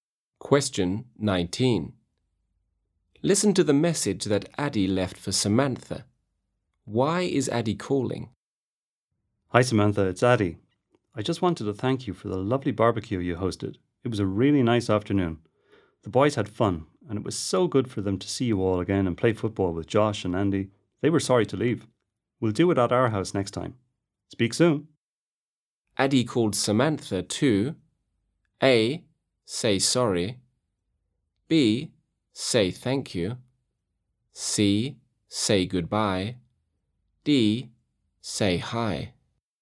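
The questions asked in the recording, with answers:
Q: Why is Addy calling?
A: B: say thank you.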